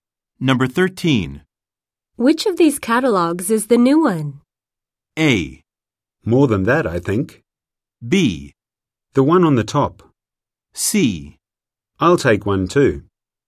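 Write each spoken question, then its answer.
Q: Which of these catalogues is the new one?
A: B: The one on the top.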